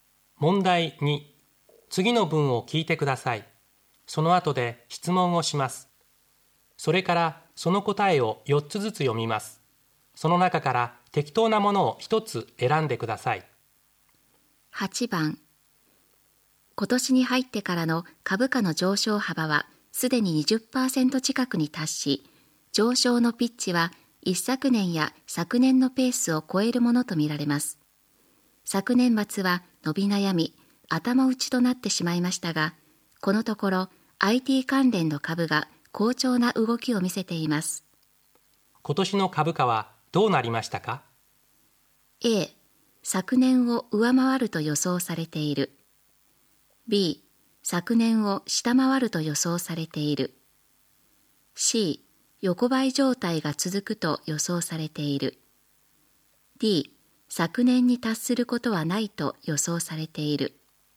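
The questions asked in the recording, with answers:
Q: 今年の株価はどうなりましたか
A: A: 昨年を上回ると予想されている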